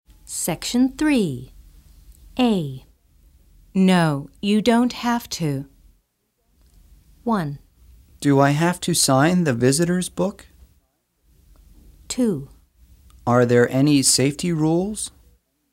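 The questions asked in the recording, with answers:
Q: No, you don't have to.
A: 1: Do I have to sign the visitor's book?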